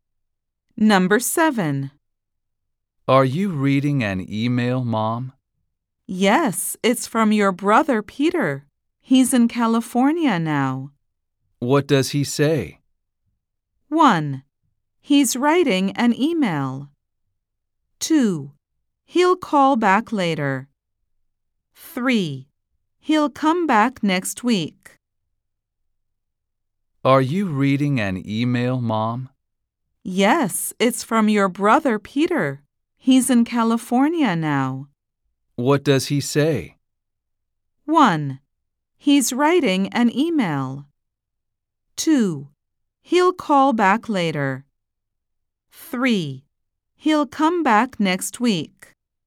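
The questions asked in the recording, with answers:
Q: What does he say?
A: 3: He'll come back next week.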